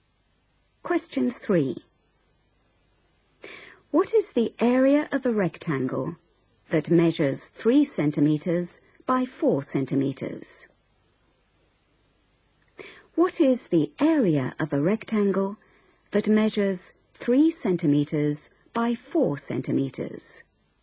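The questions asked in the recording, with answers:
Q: What is the area of a rectangle that measures 3 centimeters by 4 centimeters?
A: 12 square centimeters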